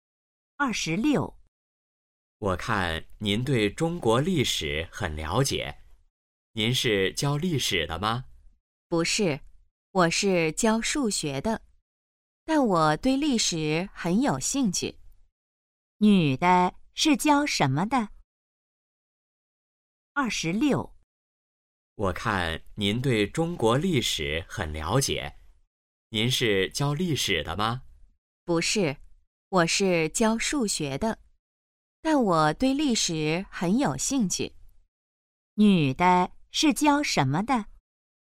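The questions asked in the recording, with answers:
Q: 女的是教什么的?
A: 数学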